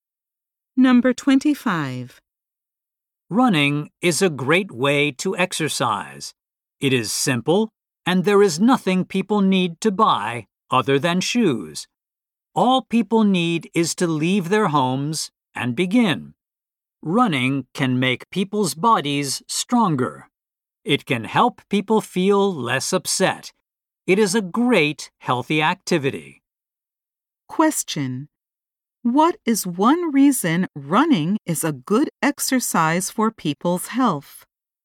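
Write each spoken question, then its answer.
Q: What is one reason running is a good exercise for people's health?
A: It makes people's bodies stronger.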